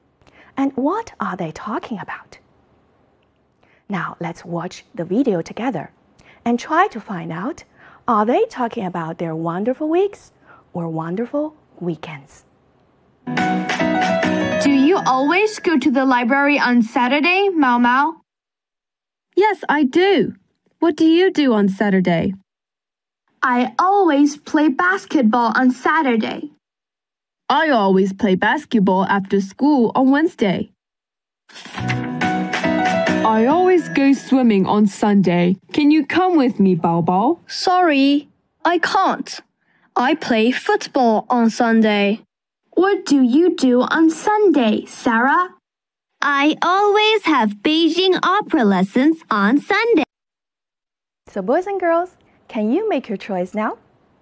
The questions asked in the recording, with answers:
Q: are they talking about their wonderful weeks or wonderful weekends?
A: They're talking about their wonderful weekends.